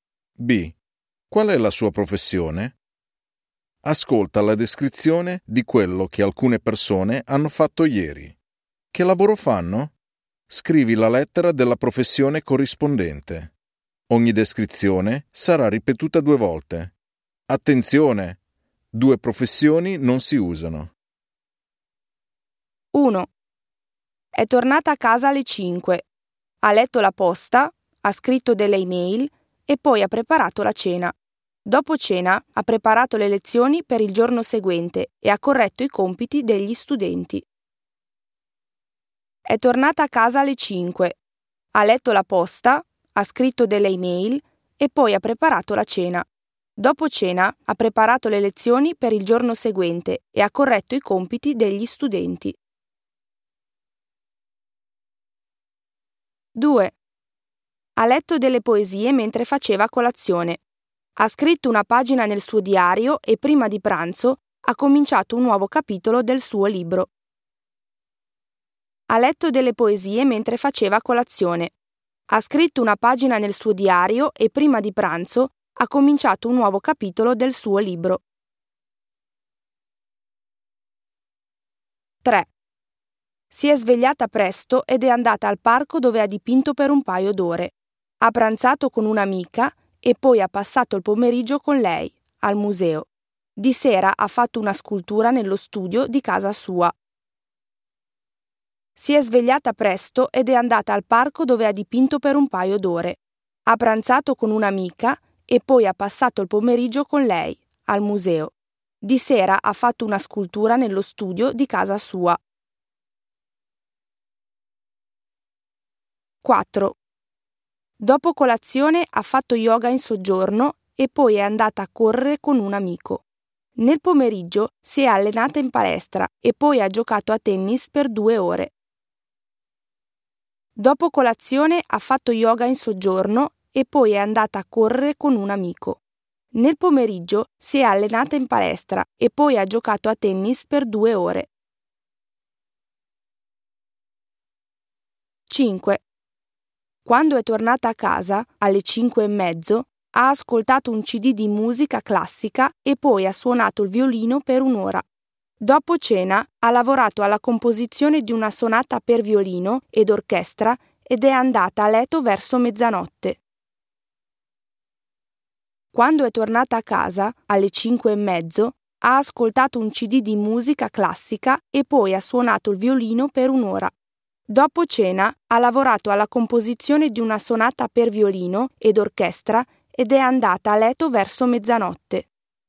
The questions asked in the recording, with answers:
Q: Che lavoro fanno?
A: E. L'insegnante.

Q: Che lavoro fanno?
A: G. La scrittrice.

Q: Che lavoro fanno?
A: A. L'artista.

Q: Che lavoro fanno?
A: B. L'atleta.

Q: Che lavoro fanno?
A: F. La musicista.